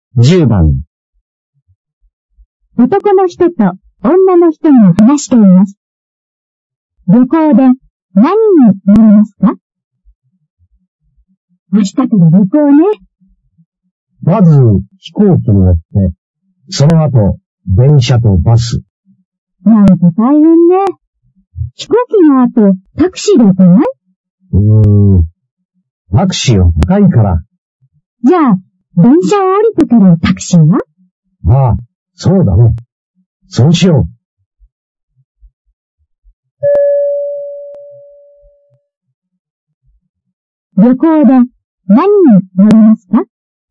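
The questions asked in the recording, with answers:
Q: 旅行で何に乗りますか?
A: 飛行機と電車とタクシー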